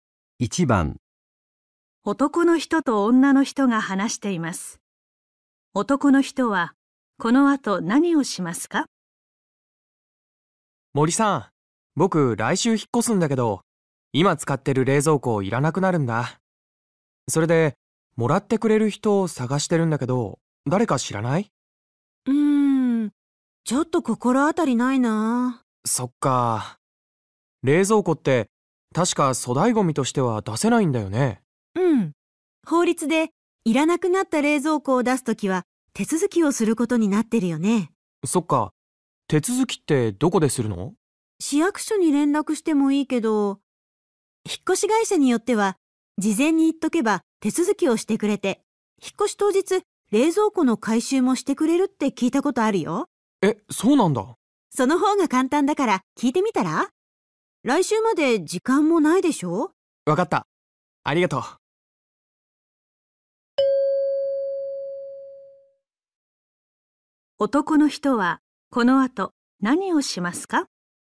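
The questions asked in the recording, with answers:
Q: 男の人はこの後何をしますか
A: 引っ越し会社に冷蔵庫の手続きと回収をしてもらえるか聞く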